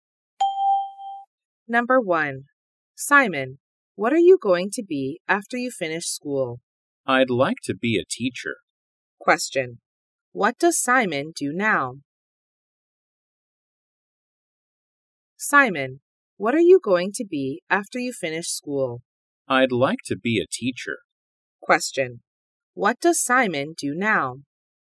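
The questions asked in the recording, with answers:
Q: What does Simon do now?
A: He is a student.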